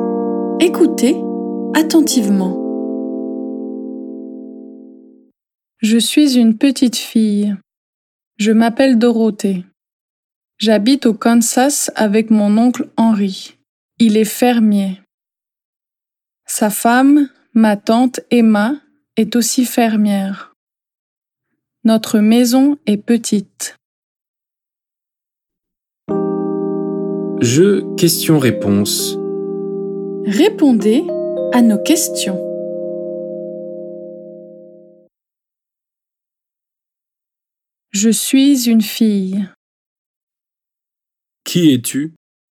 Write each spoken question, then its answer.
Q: Qui es-tu?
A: Une fille. Je suis une fille, une petite fille.